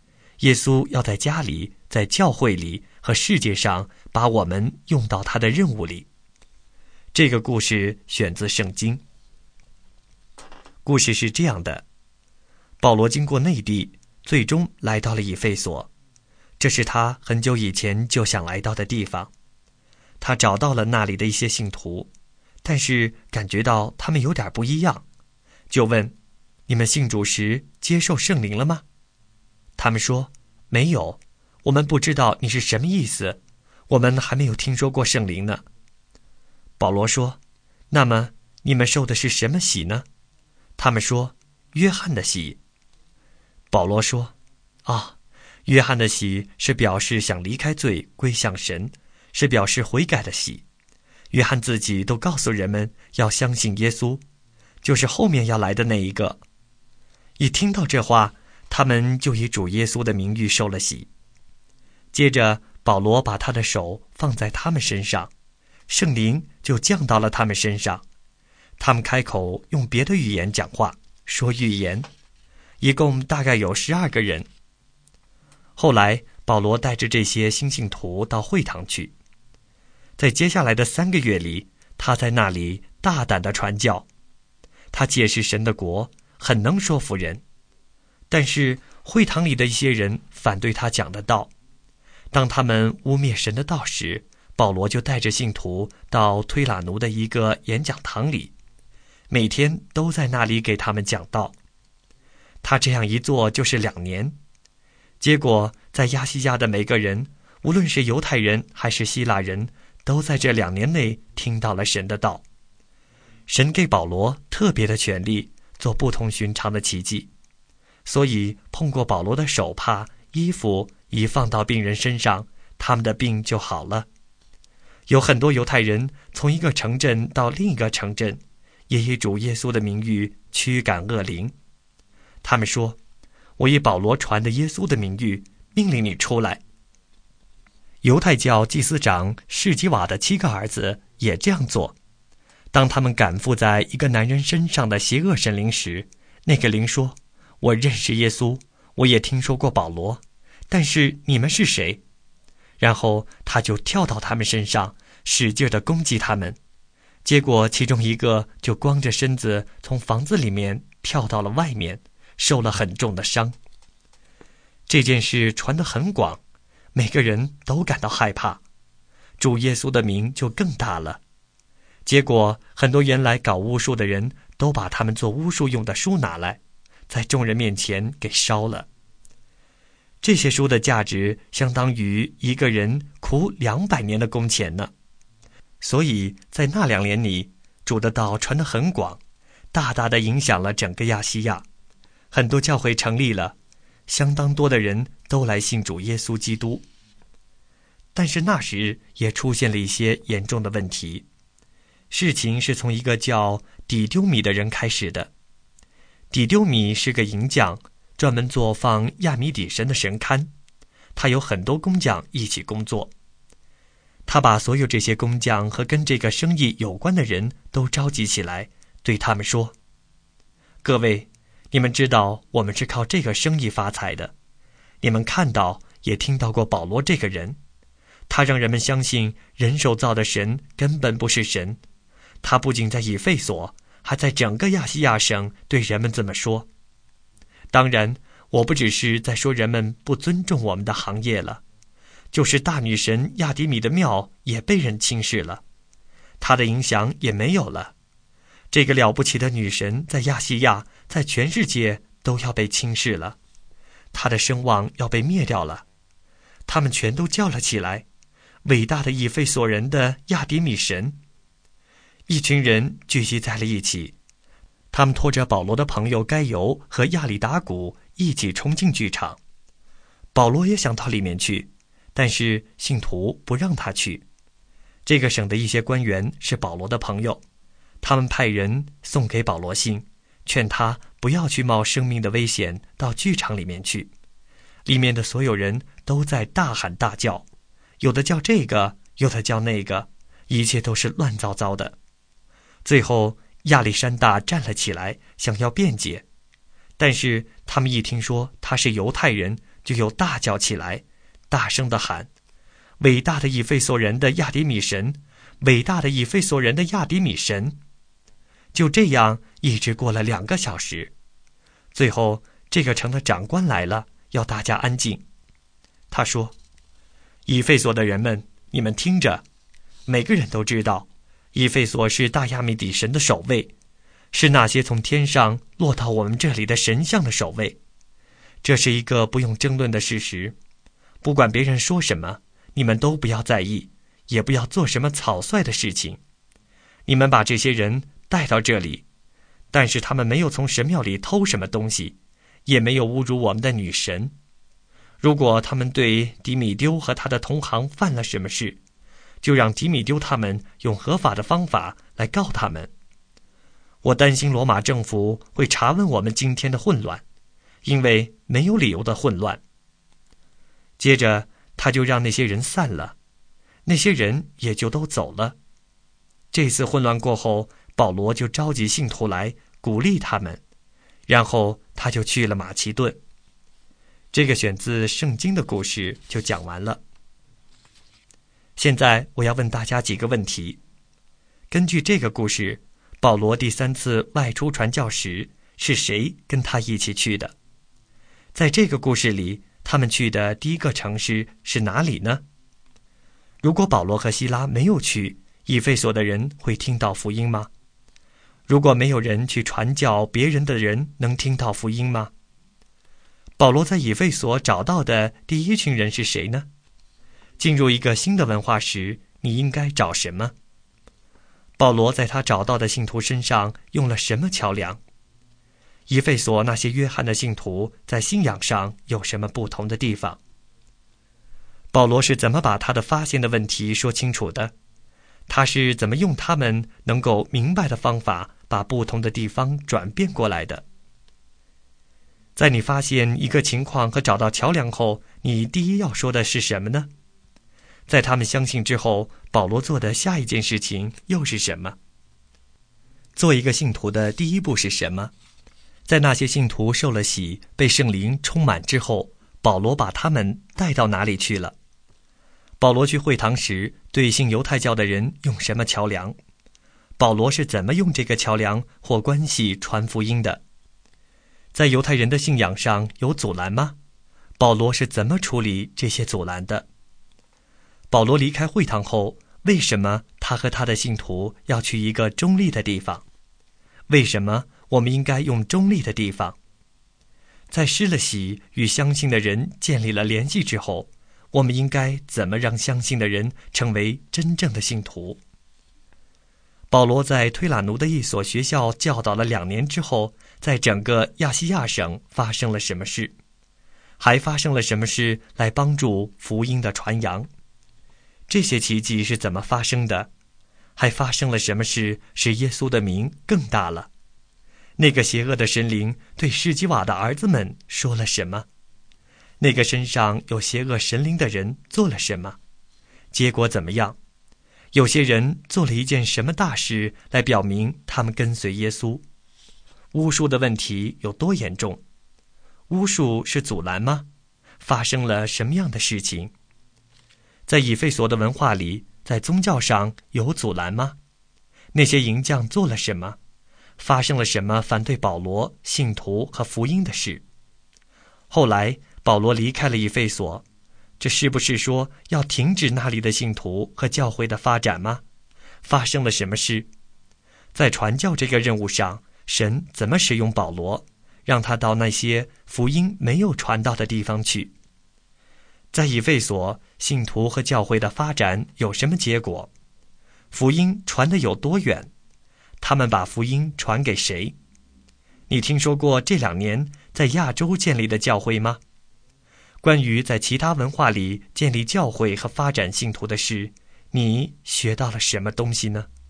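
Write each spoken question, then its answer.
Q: 保罗在以弗所找到的第一群人是谁呢?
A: 一些信徒(只受过约翰的洗的人),大约12个人

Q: 以弗所那些约翰的信徒在信仰上有什么不同的地方?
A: 他们只受过约翰的洗,没有听说过圣灵

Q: 在那些信徒受了洗,被圣灵充满之后,保罗把他们带到哪里去了?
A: 会堂

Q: 保罗在推拉奴的一所学校教导了2年之后,在整个亚细亚省发生了什么事?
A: 亚细亚的每个人,无论是犹太人还是希腊人,都听到了神的道

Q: 那个邪恶的神灵对施基瓦的儿子们说了什么?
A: 我认识耶稣,我也听说过保罗,但是你们是谁?

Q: 那个身上有邪恶神灵的人做了什么?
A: 跳到他们身上,使劲地攻击他们

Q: 有些人做了一件什么大事来表明他们跟随耶稣?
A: 把他们做巫术用的书拿来,在众人面前烧了

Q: 那些淫匠做了什么?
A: 他们聚众大叫,拖着保罗的朋友该由和亚里达古冲进剧场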